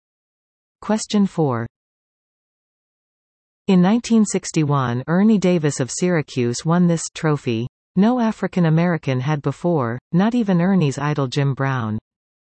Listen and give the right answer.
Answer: The answer? The Heisman.